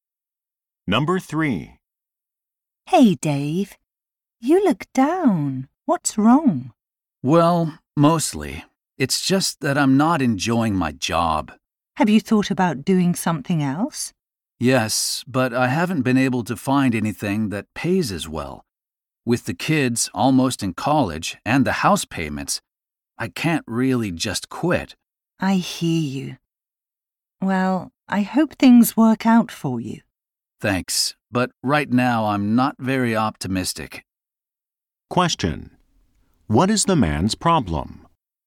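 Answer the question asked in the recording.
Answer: He doesn't enjoy his job but can't afford to quit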